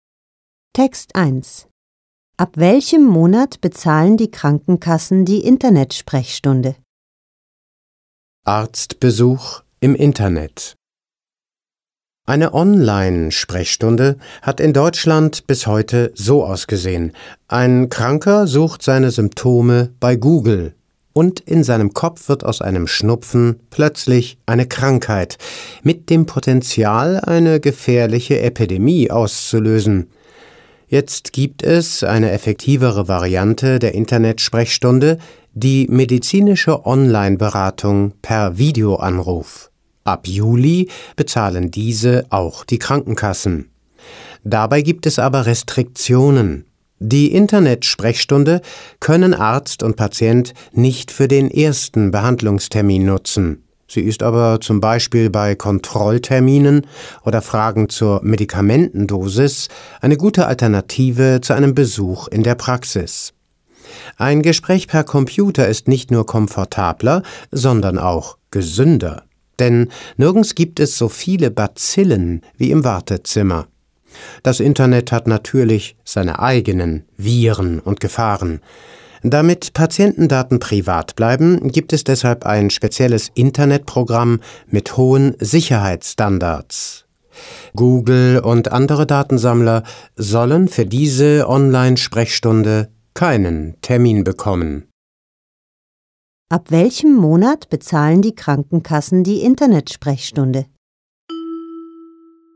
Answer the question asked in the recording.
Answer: Sie bezahlen sie ab Juli.